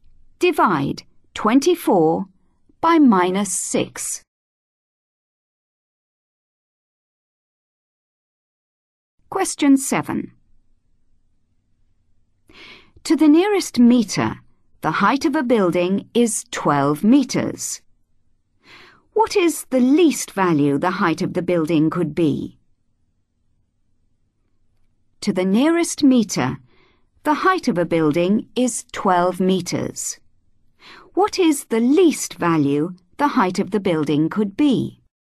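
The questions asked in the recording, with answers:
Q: What is the least value the height of the building could be?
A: 11.5 metres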